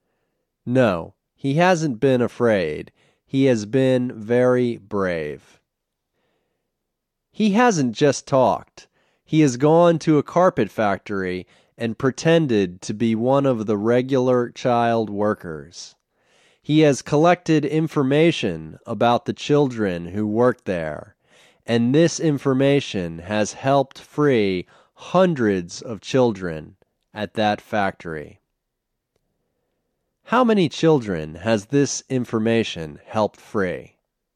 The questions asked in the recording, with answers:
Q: How many children has this information helped free?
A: This information has helped free hundreds of children at that factory.